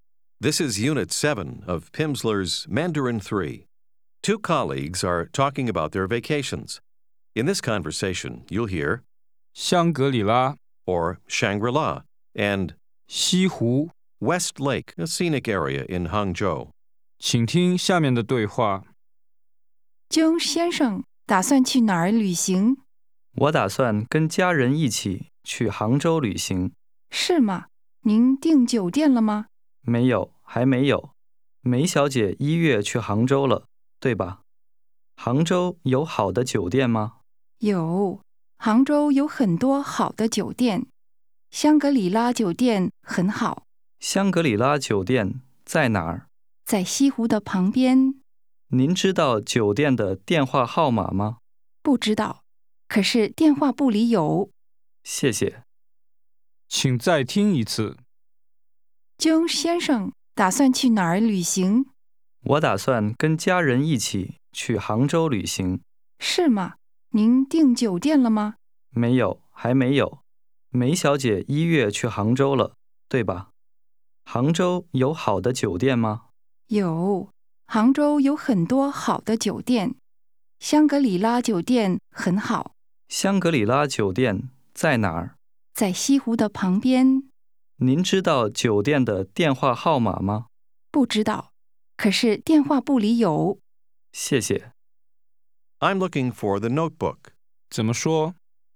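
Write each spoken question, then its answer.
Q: 江先生打算去哪儿旅行?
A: 杭州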